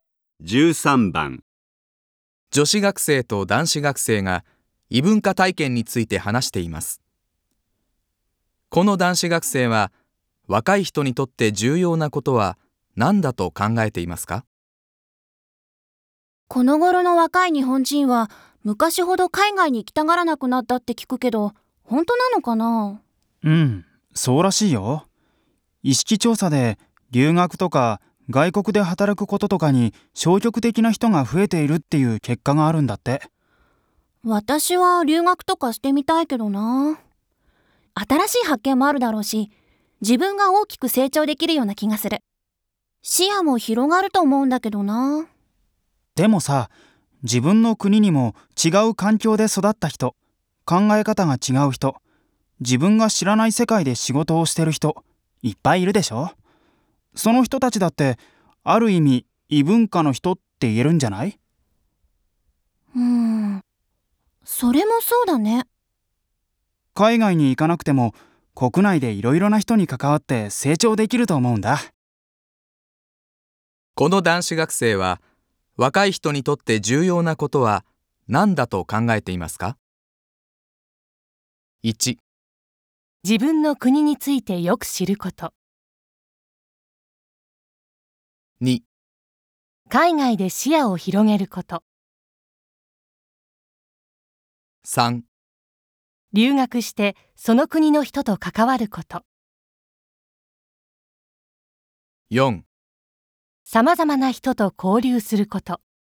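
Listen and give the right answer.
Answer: 4: さまざまな人と交流すること。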